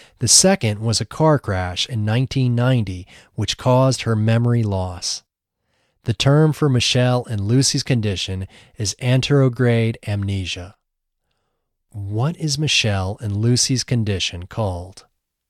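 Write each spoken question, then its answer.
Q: What is Michelle and Lucy's condition called?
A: Anterograde amnesia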